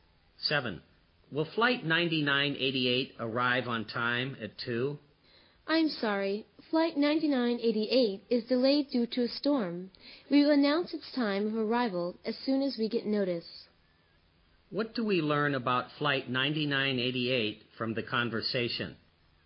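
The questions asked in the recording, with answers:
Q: What do we learn about Flight 9988 from the conversation?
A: It is delayed because of a storm.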